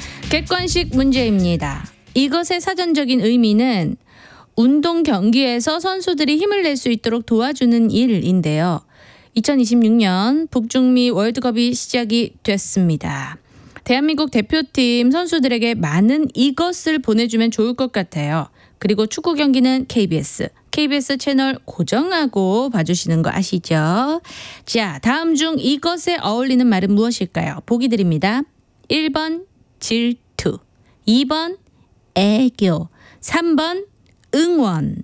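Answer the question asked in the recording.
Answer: 3: 응원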